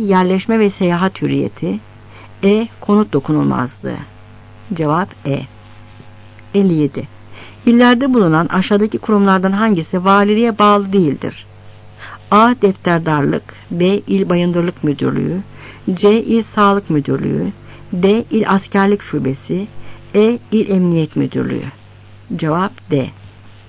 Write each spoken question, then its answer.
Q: illerde bulunan aşağıdaki kurumlardan hangisi valiliğe bağlı değildir?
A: Cevap D.